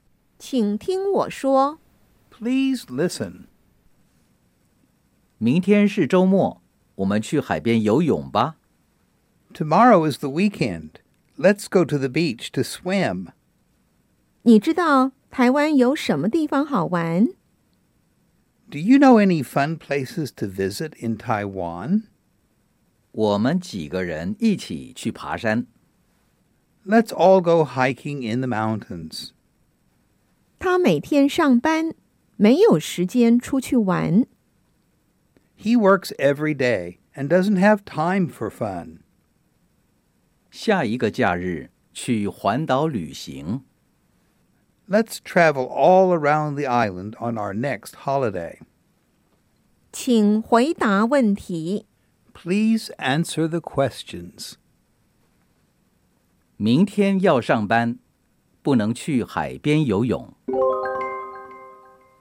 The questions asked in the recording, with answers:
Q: 明天要上班,不能去海边游泳。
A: 不对